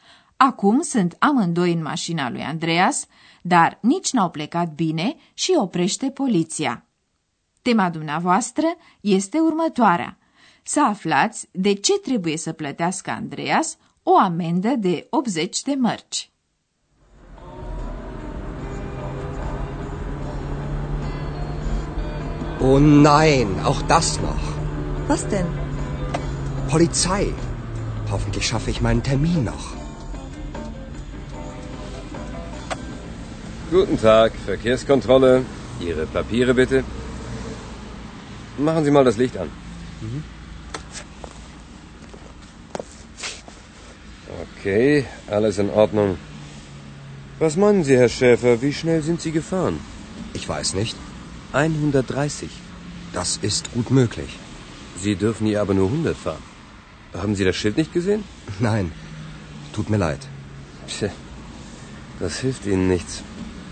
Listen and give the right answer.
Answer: Andreas trebuie să plătească o amendă de 80 de mărci pentru că a depășit viteza reglementară.